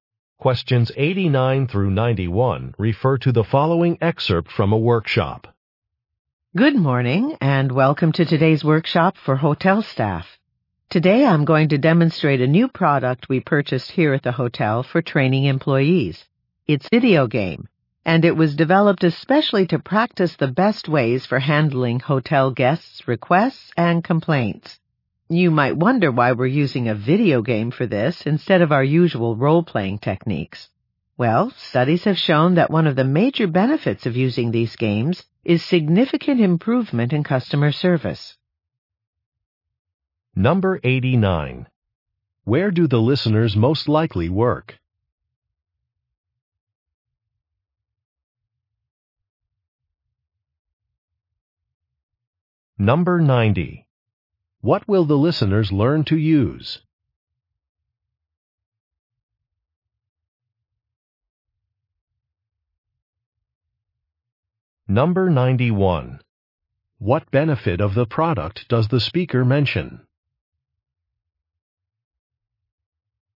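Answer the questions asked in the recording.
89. At a hotel
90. A video game
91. Improved customer service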